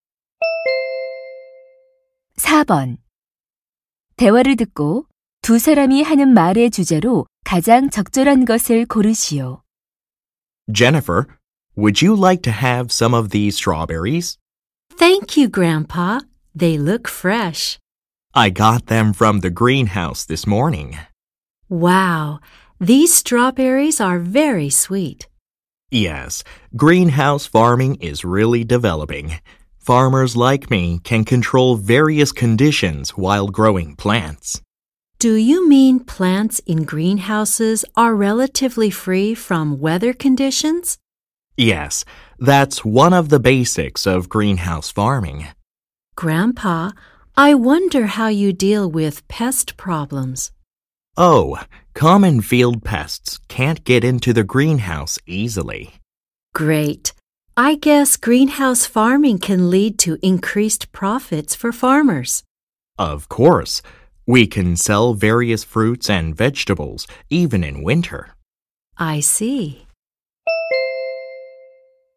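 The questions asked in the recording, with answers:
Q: 대화를 듣고 두 사람이 하는 말의 주제로 가장 적절한 것을 고르시오.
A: 온실 재배의 장점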